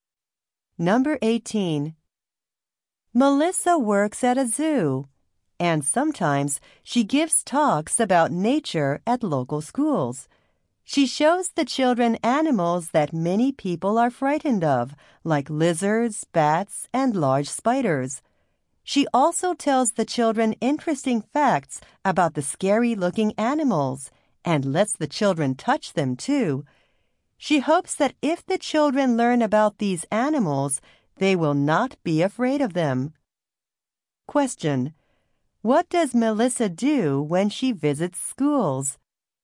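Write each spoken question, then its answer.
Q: What does Melissa do when she visits schools?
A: Shows children scary-looking animals and lets them touch them.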